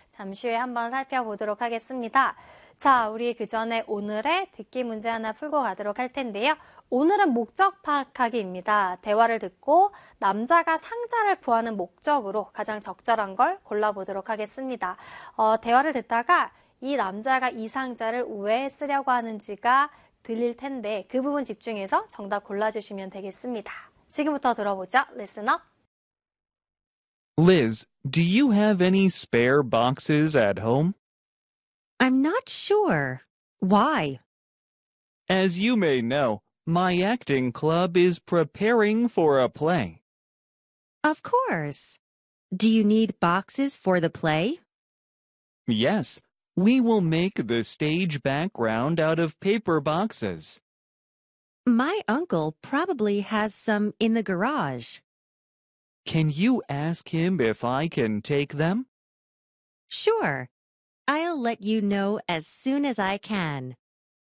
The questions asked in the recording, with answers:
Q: 대화를 듣고 남자가 상자를 구하는 목적으로 가장 적절한 걸 골라보도록 하겠습니다.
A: 남자는 연극 무대에 사용하기 위해서 지금 상자를 구하고 있습니다.